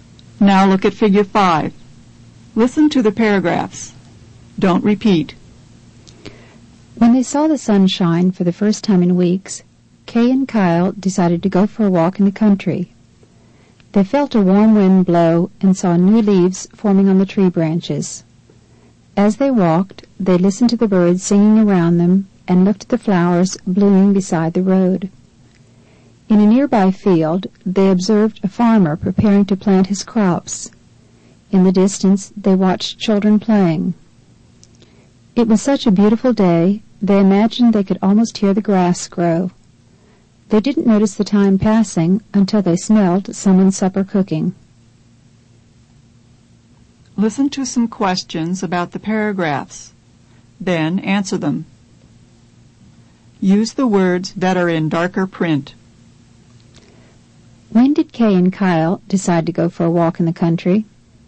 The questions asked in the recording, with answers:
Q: When did Kay and Kyle decide to go for a walk in the country?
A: They decided to go when they saw the sun shine for the first time in weeks.